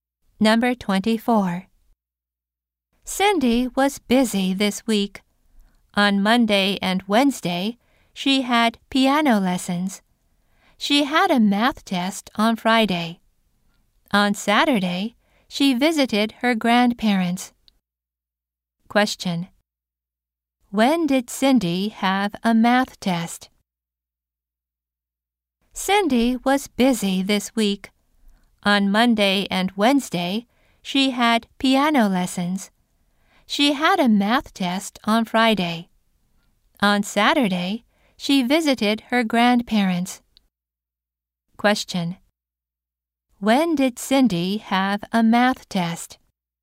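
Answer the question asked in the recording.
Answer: On Friday.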